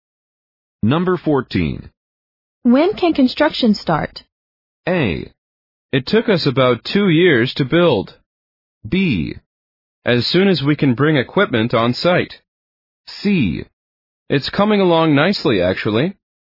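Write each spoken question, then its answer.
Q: When can construction start?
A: B: As soon as we can bring equipment on site.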